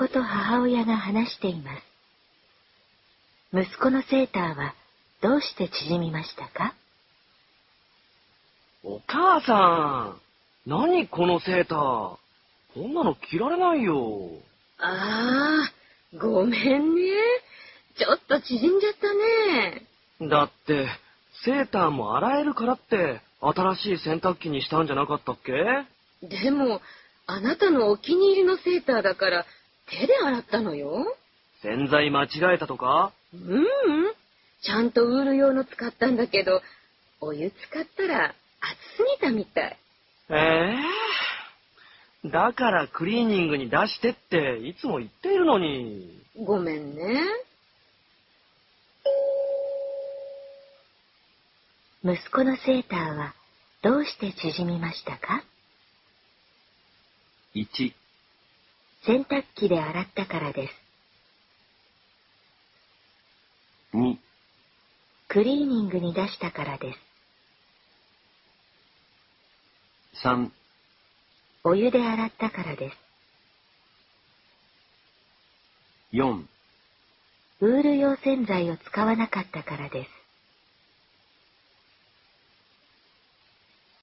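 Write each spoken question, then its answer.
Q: 息子のセーターはどうして縮みましたか?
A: 3: お湯で洗ったからです。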